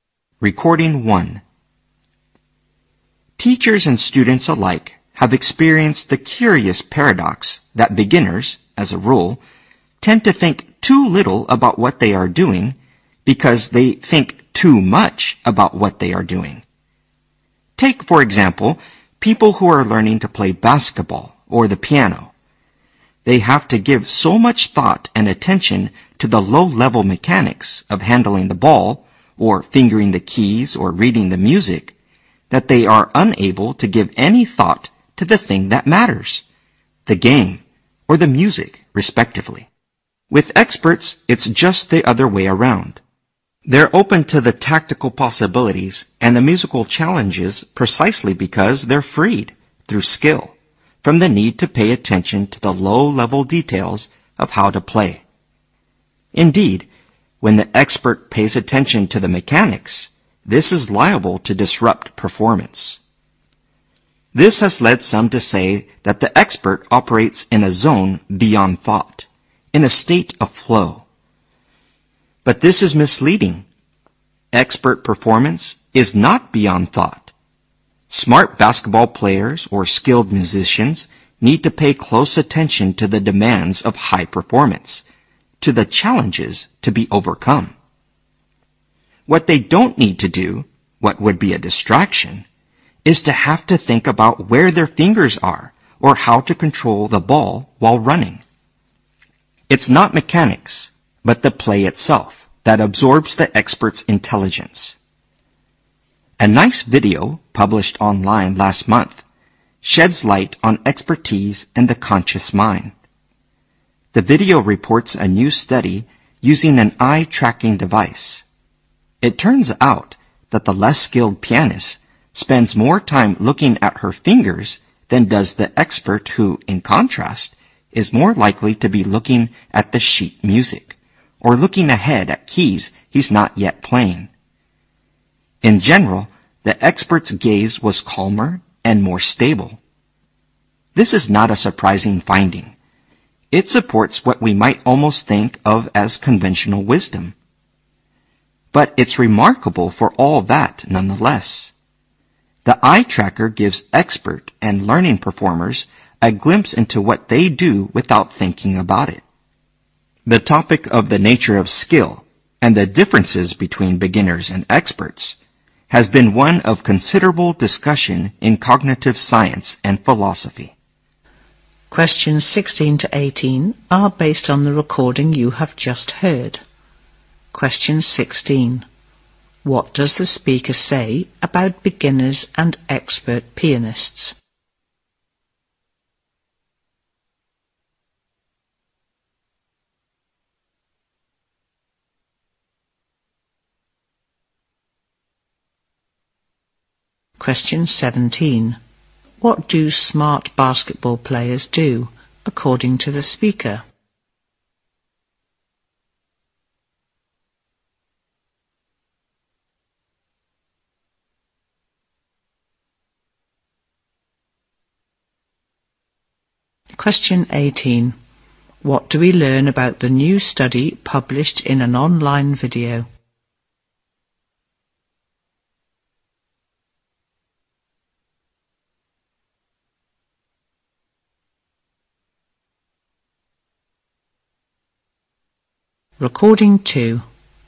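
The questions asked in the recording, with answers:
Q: What do smart basketball players do, according to the speaker?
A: Pay close attention to the demands of high performance

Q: What do we learn about the new study published in an online video?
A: It used an eye-tracking device and found experts look less at their fingers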